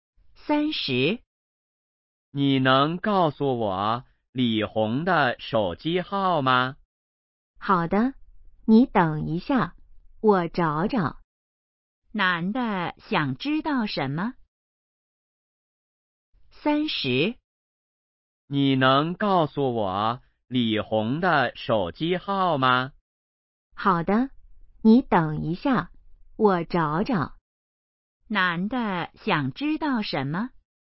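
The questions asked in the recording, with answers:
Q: 男的想知道什么?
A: 李红的手机号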